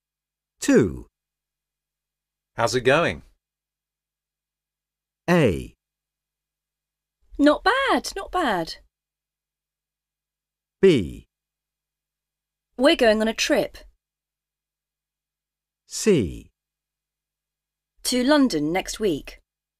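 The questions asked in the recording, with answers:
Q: How's it going?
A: A: Not bad, not bad.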